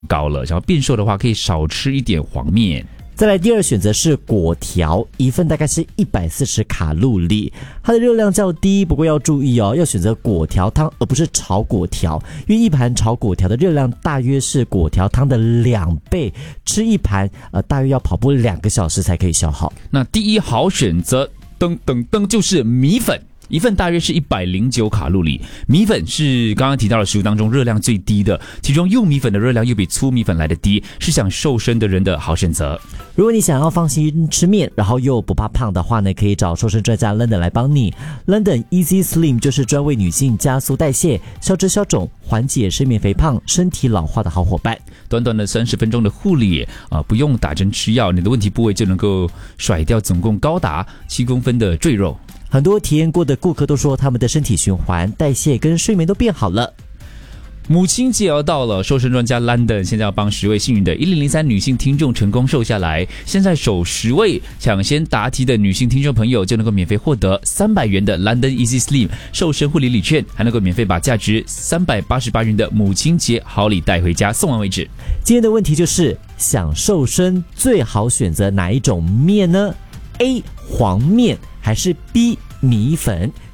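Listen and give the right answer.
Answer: B: 米粉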